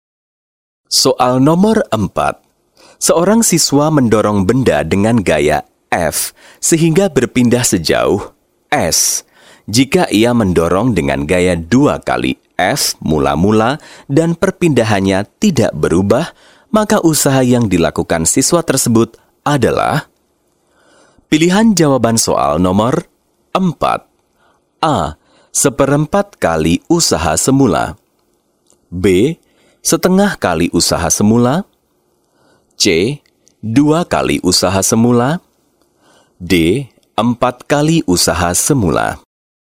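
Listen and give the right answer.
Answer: C: 2 kali usaha semula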